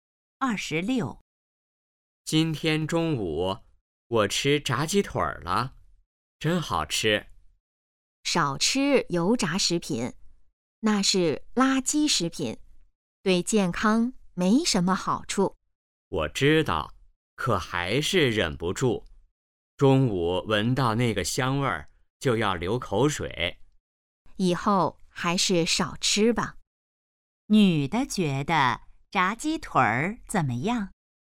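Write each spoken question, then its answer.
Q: 女的觉得炸鸡腿儿怎么样?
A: 是垃圾食品,对健康不好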